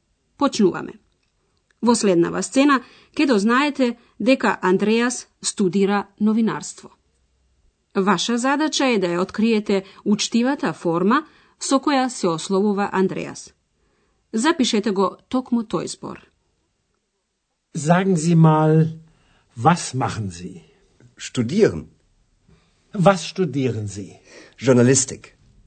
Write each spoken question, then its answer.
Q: Ваша задача е да ја откриете учтивата форма со која се ословува Андреас.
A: Таа гласи зи, вие.